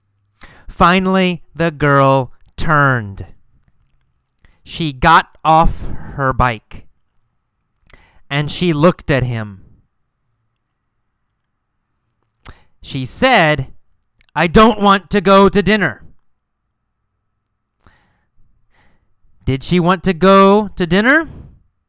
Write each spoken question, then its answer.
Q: Did she want to go to dinner?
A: No.